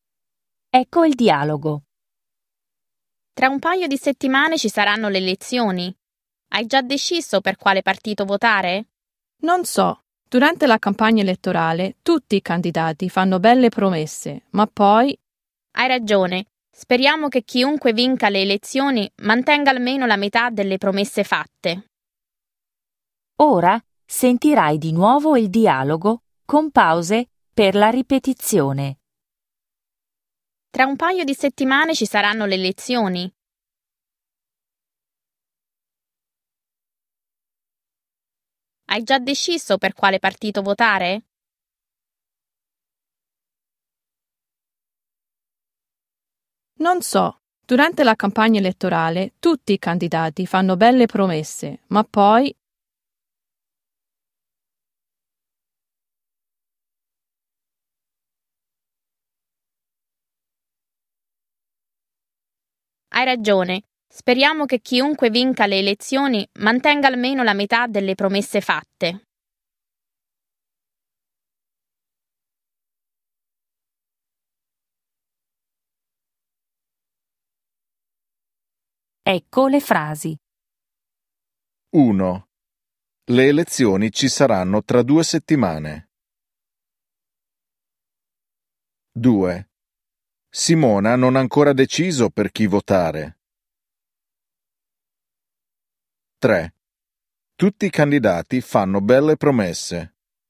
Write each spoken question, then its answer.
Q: Le elezioni ci saranno tra due settimane.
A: 1. Vero.

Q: Simona non ha ancora deciso per chi votare.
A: 2. Vero.